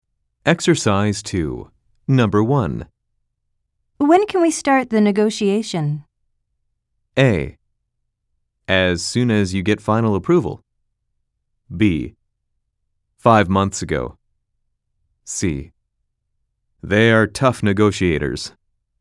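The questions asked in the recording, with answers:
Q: When can we start the negotiation?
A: A: As soon as you get final approval.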